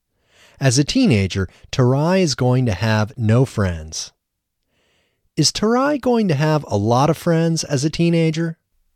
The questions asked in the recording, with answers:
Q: Is Tarai going to have a lot of friends as a teenager?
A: No, Tarai is not going to have lots of friends as a teenager.